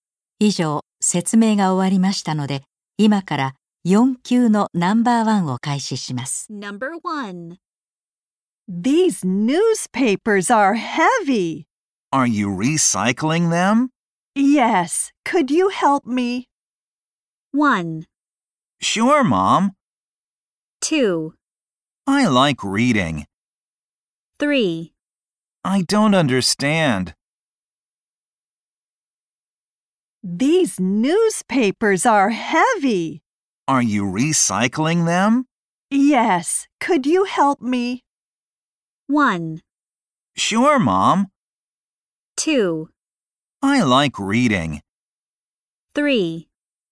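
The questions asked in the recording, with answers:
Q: Yes, could you help me?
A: 1: Sure, Mom.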